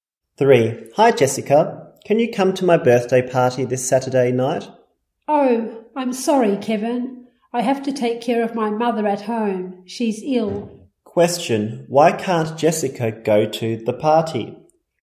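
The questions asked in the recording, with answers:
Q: why can't Jessica go to the party?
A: She has to take care of her ill mother at home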